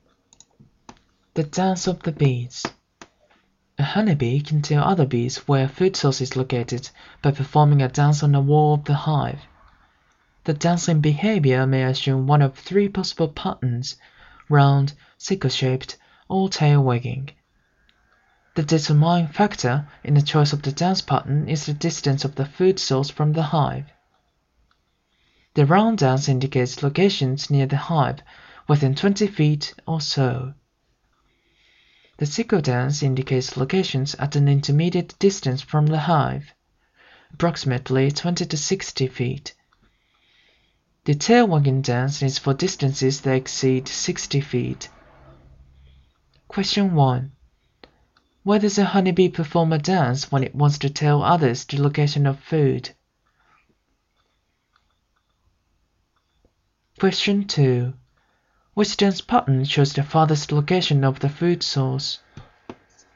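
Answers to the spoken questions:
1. On the wall of the hive
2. The tail wagging dance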